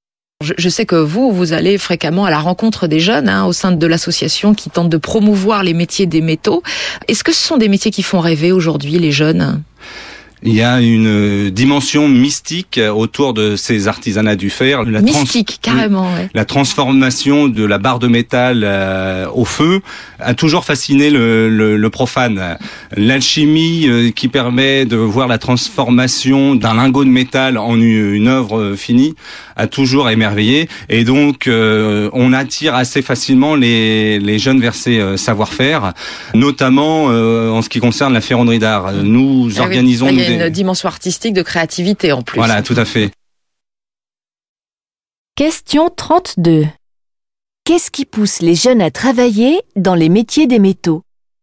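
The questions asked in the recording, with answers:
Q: Qu'est-ce qui pousse les jeunes à travailler dans les métiers des métaux ?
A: La fascination pour la transformation du métal au feu, une dimension mystique et artistique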